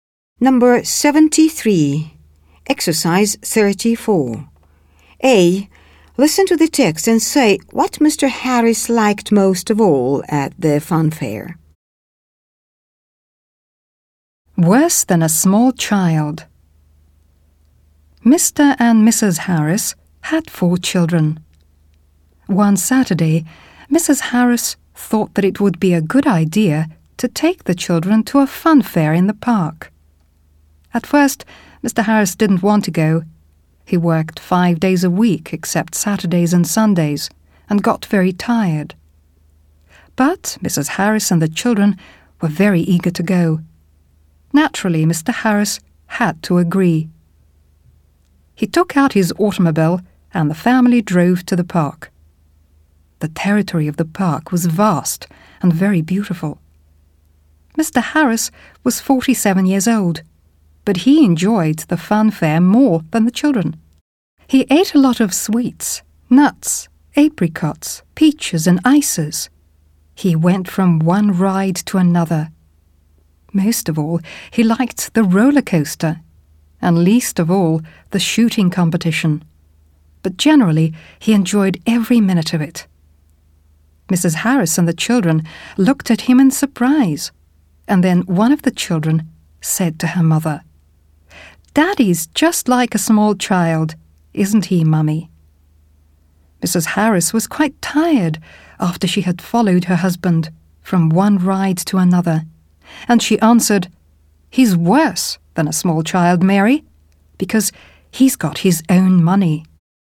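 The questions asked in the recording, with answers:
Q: Listen to the text and say what Mr. Harris liked most of all at the funfair.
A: The roller coaster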